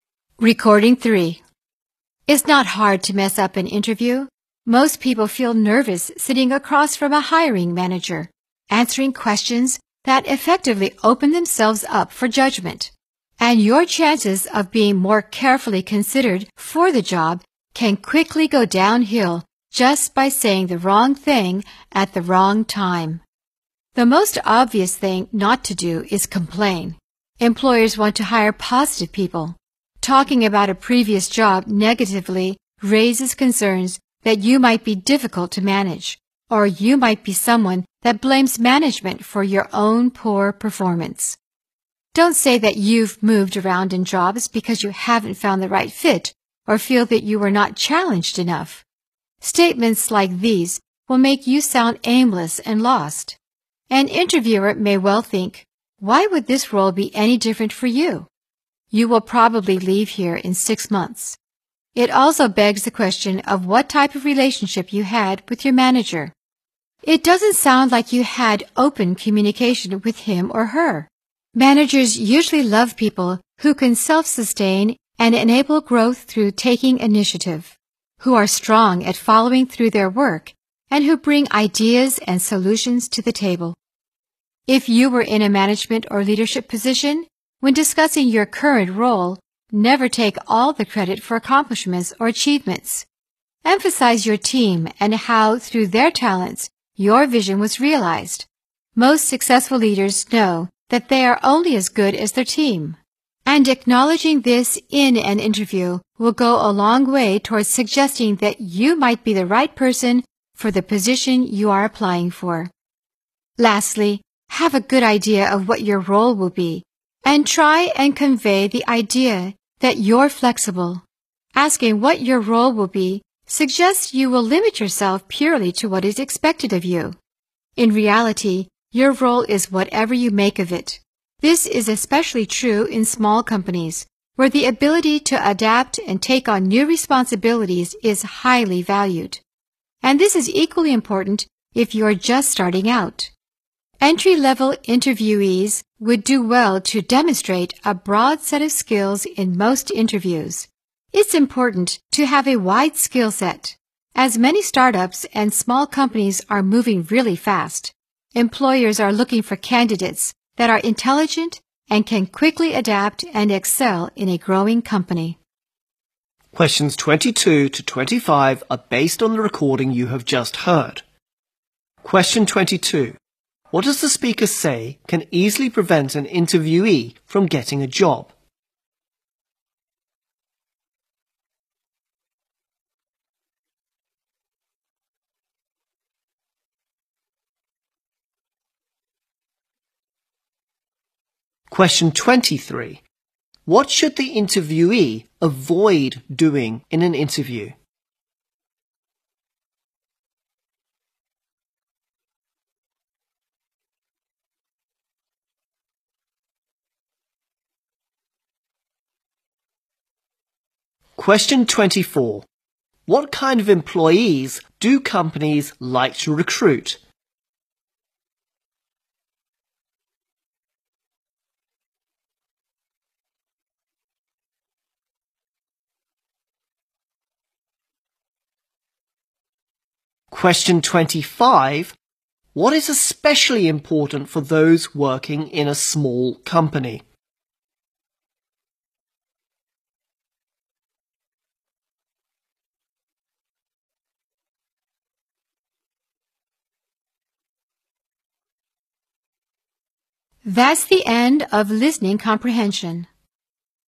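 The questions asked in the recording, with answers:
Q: What does the speaker say can easily prevent an interviewee from getting a job?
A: Saying the wrong thing at the wrong time.

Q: What is especially important for those working in a small company?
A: The ability to adapt and take on new responsibilities.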